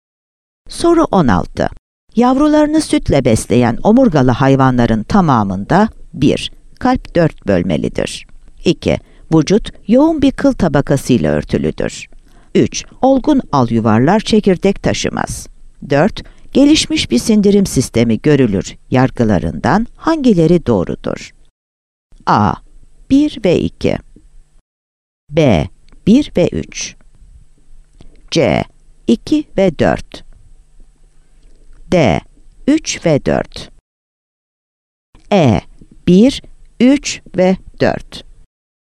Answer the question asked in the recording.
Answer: Yanıt E'dir.